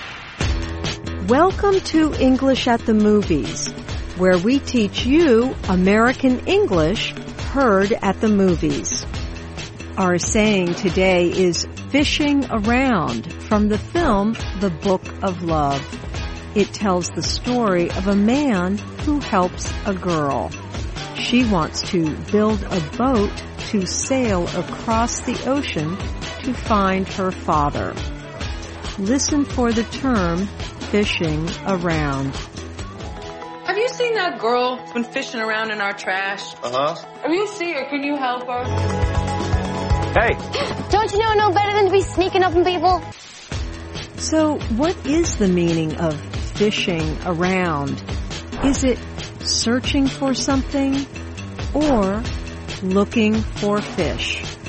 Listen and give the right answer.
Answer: Fishing around means searching for something.